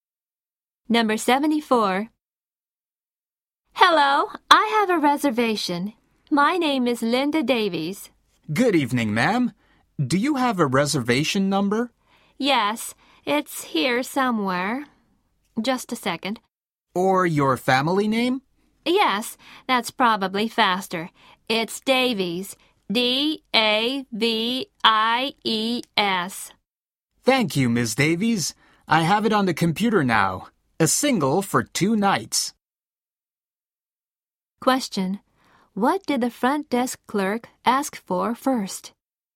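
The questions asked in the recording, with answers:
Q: What did the front desk clerk ask for first?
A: Her reservation number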